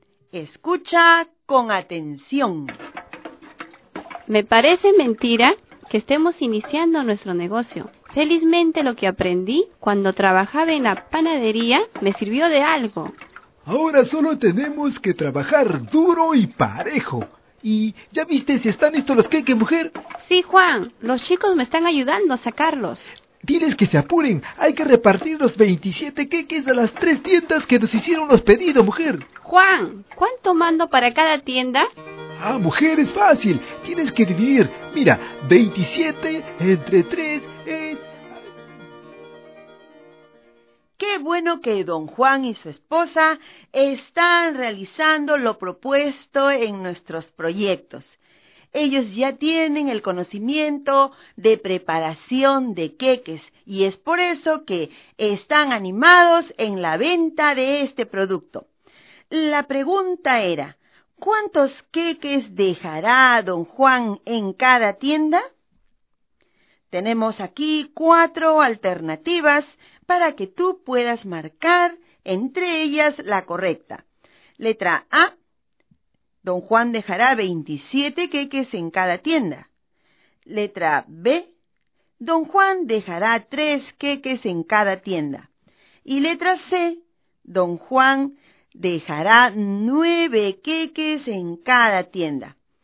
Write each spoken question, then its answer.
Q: ¿cuántos queques dejará don Juan en cada tienda?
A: Por lo tanto, la respuesta a la pregunta era la letra C.